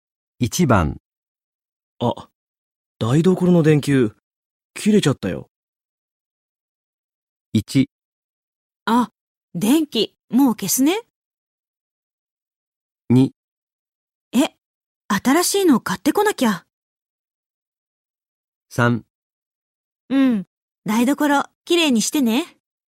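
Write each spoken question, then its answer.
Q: あ、台所の電球、切れちゃったよ。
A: 2: え、新しいの買ってこなきゃ。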